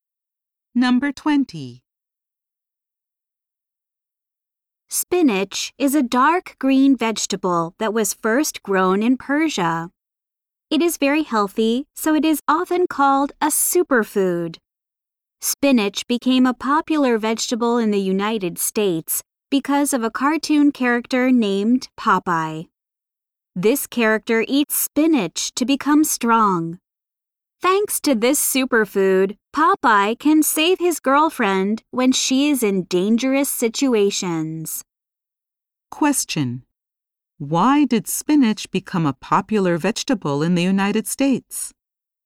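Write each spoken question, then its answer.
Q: Why did spinach become a popular vegetable in the United States?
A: Because of the cartoon character Popeye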